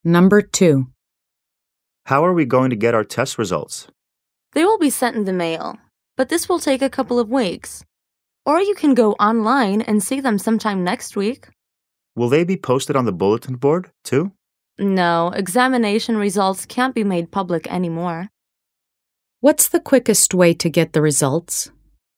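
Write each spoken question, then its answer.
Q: What's the quickest way to get the results?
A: Check them online (available next week)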